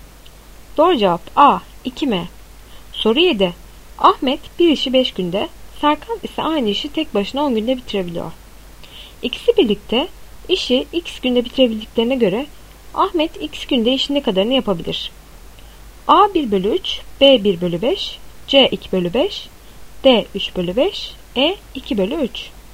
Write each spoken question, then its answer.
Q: İkisi birlikte işi x günde bitirebildiklerine göre Ahmet x günde işin ne kadarını yapabilir?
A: Doğru cevap E 2 bölü 3.